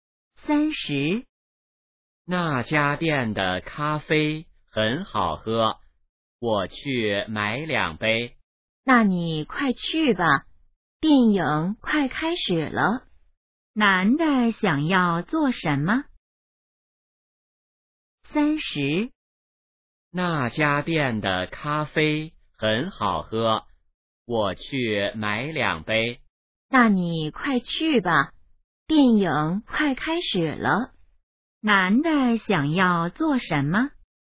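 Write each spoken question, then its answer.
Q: 男的想要做什么?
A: 买咖啡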